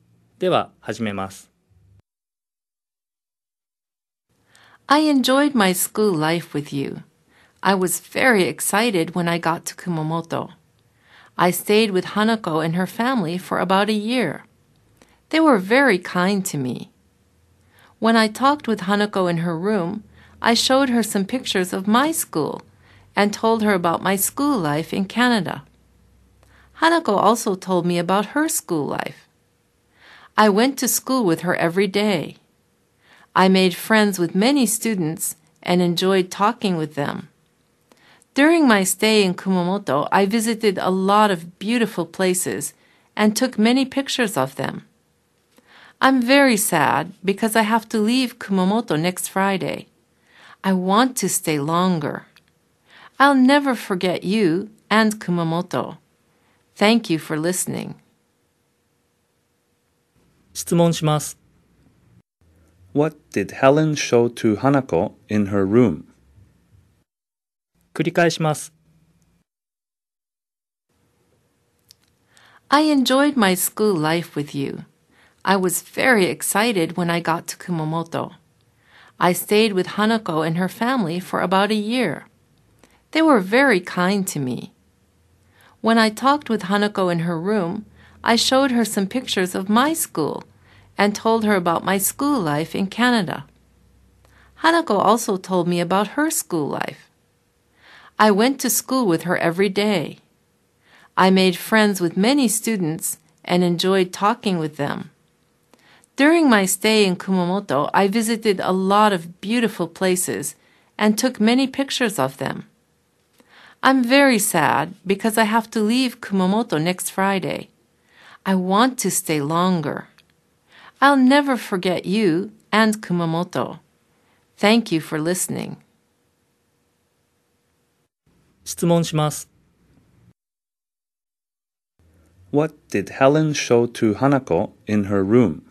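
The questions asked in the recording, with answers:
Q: What did Helen show to Hanako in her room?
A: Some pictures of her school.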